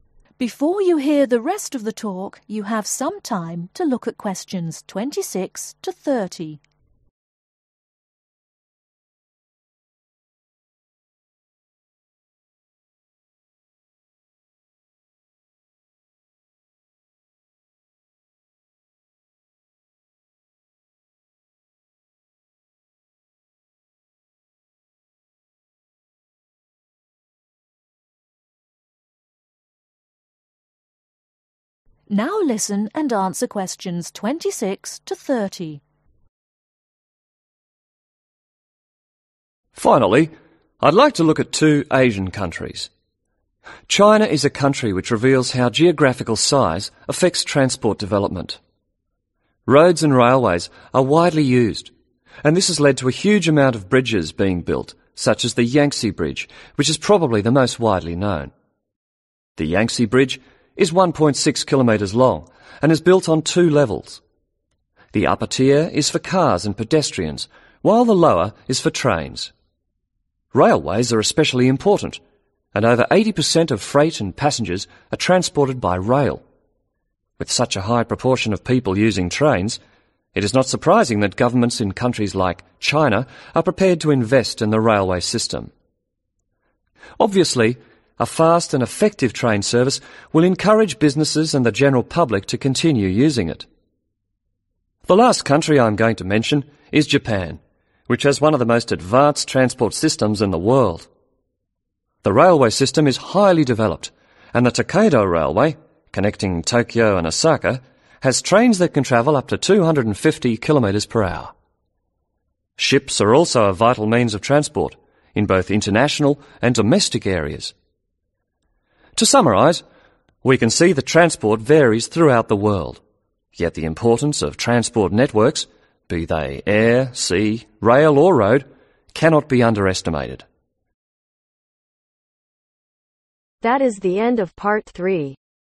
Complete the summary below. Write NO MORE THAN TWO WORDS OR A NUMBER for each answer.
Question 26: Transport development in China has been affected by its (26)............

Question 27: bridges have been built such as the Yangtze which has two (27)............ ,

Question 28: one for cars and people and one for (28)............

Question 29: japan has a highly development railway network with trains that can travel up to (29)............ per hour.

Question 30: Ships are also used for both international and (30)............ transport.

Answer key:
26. Geographical Size
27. Levels Tiers
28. Trains
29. 250 km
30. Domestic